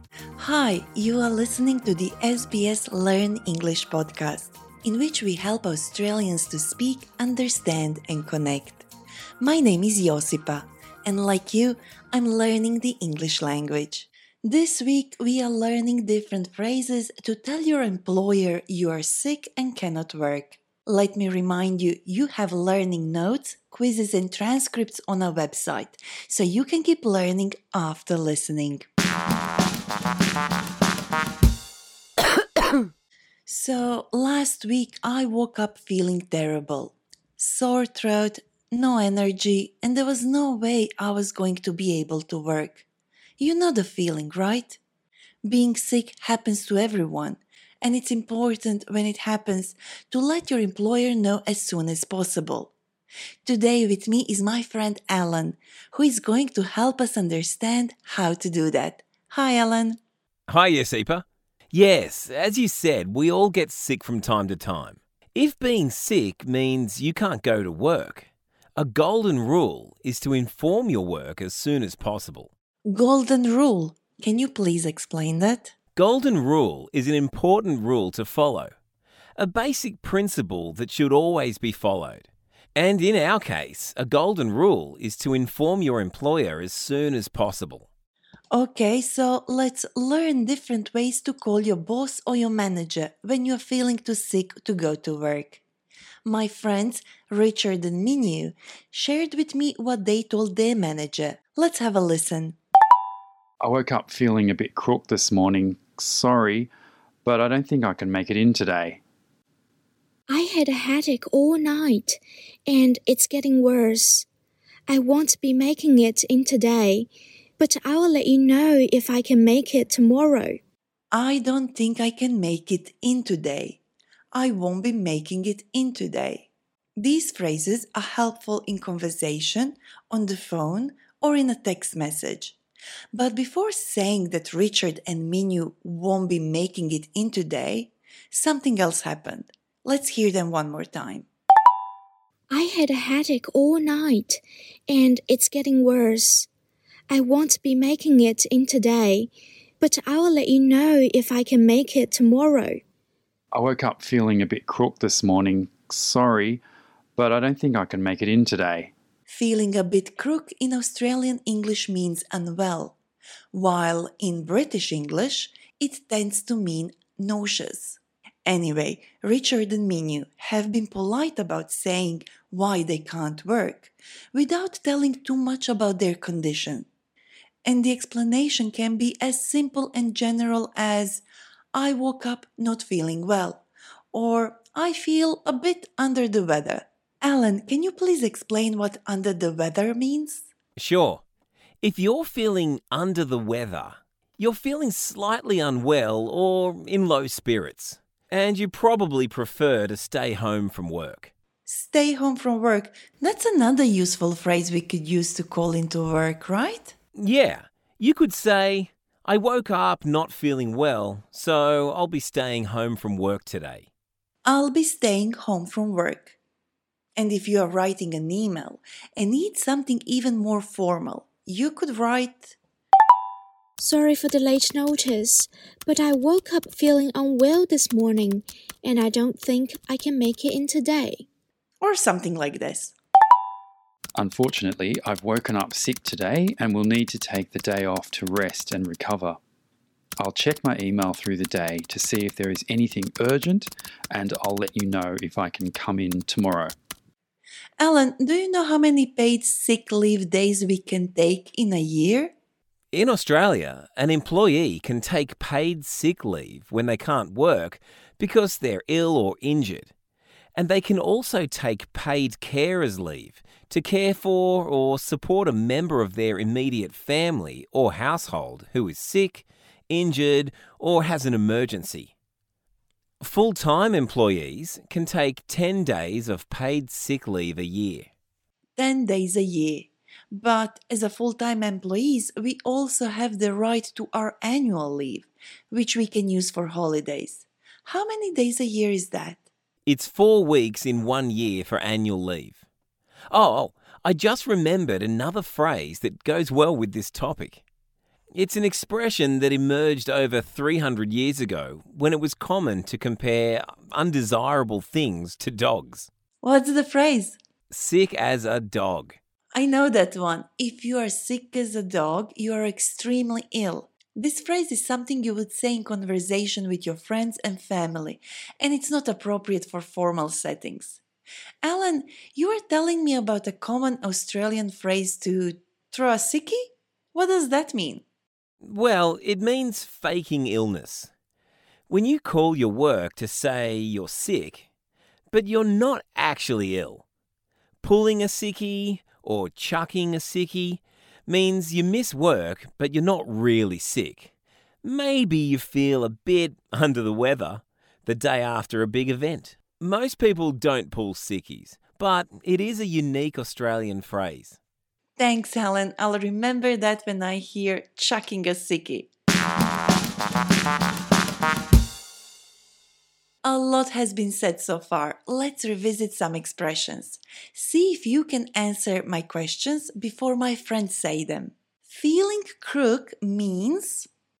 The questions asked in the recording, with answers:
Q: Feeling crook means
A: In Australian English, feeling crook means feeling sick.